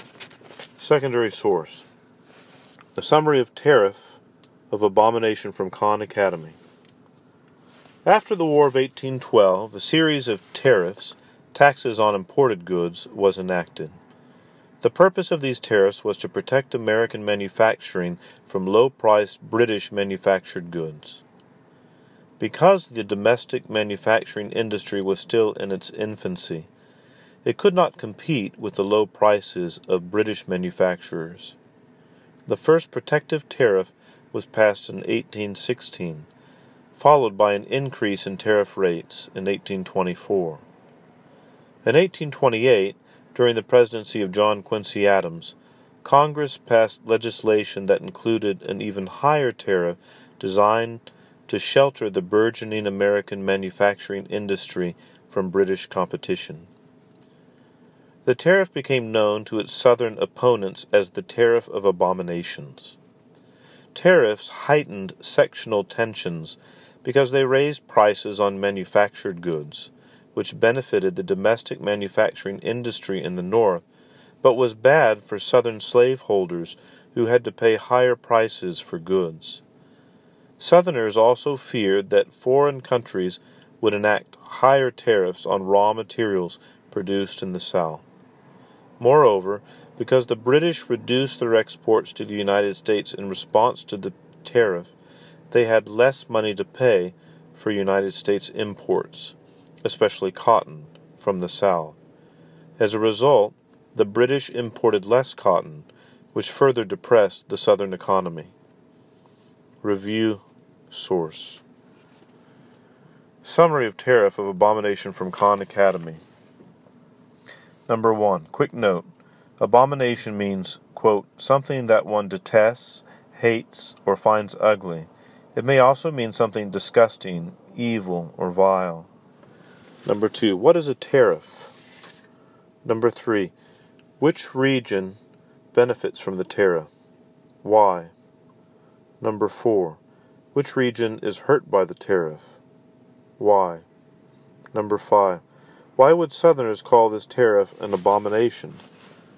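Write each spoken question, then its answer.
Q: What is a tariff?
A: A tax on imported goods

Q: Which region benefits from the tariff?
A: The North, because its manufacturing industry was protected from British competition

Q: Which region is hurt by the tariff?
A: The South, because Southerners paid higher prices for goods and Britain bought less cotton

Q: Why would Southerners call this tariff an abomination?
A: It raised their prices and hurt the Southern economy while helping the North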